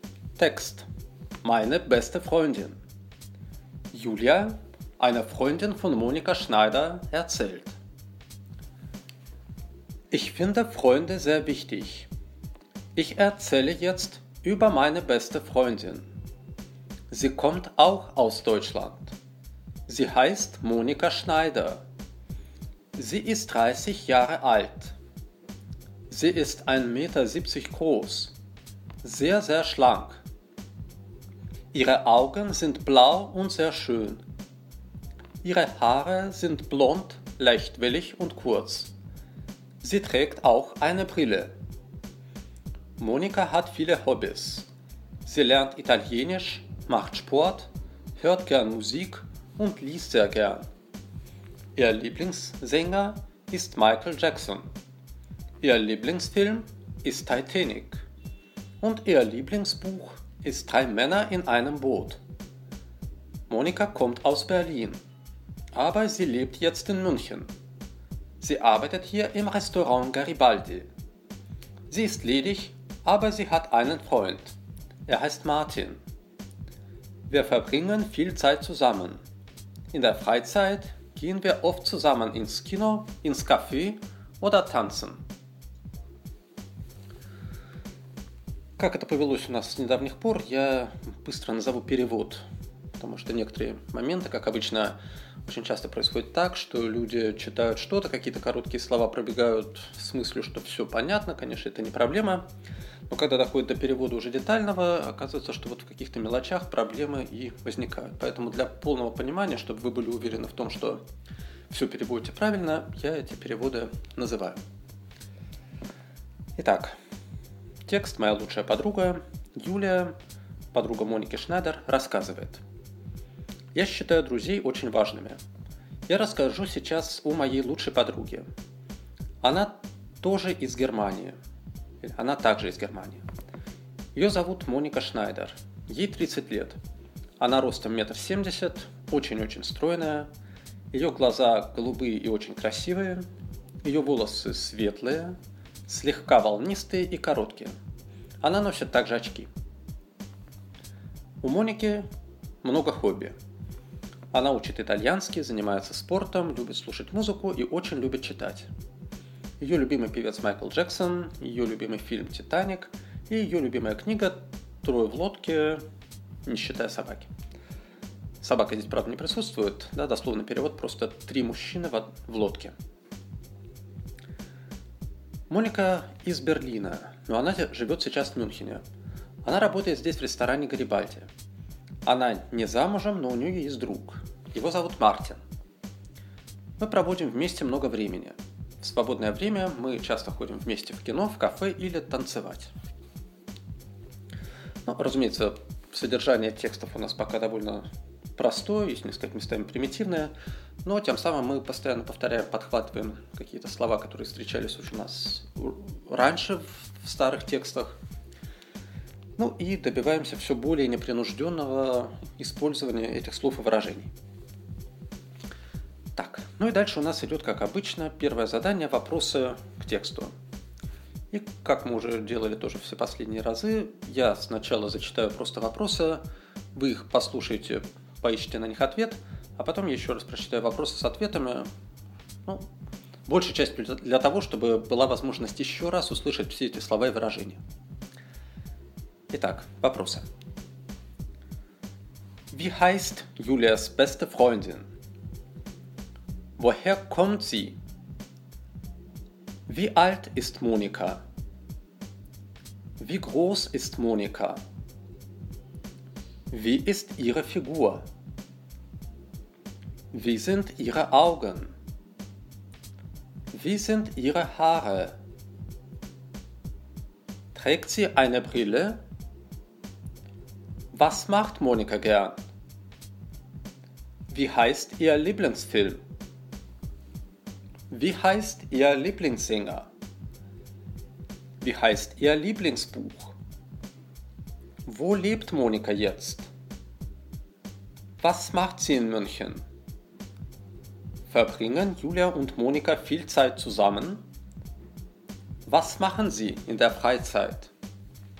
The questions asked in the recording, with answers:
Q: Wie heißt Julias beste Freundin?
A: Julias beste Freundin heißt Monika.

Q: Woher kommt sie?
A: Sie kommt aus Deutschland.

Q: Wie alt ist Monika?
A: Monika ist 30 Jahre alt.

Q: Wie groß ist Monika?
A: Monika ist 1,70 Meter groß.

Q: Wie ist ihre Figur?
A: Ihre Figur ist sehr schlank.

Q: Wie sind ihre Augen?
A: Ihre Augen sind blau und sehr schön.

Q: Wie sind ihre Haare?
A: Ihre Haare sind blond, leichtwillig und kurz.

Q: Trägt sie eine Brille?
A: Ja, sie trägt eine Brille.

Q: Was macht Monika gern?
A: Monika lernt gern Italienisch, macht Sport, hört gern Musik und liest sehr gern.

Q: Wie heißt ihr Lieblingsfilm?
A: Ihr Lieblingsfilm heißt Titanic.

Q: Wie heißt ihr Lieblingsbuch?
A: Ihr Lieblingsbuch heißt Drei Männer in einem Boot.

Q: Wo lebt Monika jetzt?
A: Monika lebt jetzt in München.

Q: Was macht sie in München?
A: Sie arbeitet in München im Restaurant Garibaldi.

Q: Verbringen Julia und Monika viel Zeit zusammen?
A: Ja, Julia und Monika verbringen viel Zeit zusammen.

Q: Was machen sie in der Freizeit?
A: In der Freizeit gehen Sie oft zusammen ins Kino, ins Café oder tanzen.